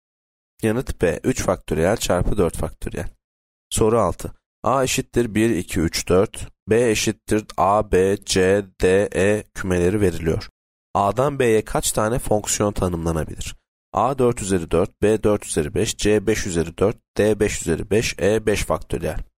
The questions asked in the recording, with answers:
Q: A'dan B'ye kaç tane fonksiyon tanımlanabilir?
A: Yanıt C 5 üzeri 4.